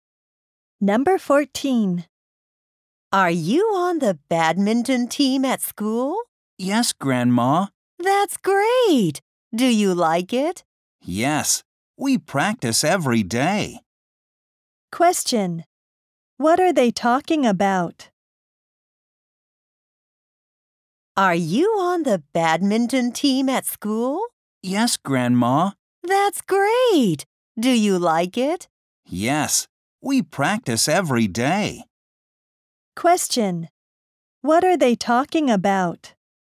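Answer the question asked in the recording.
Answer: The badminton team at school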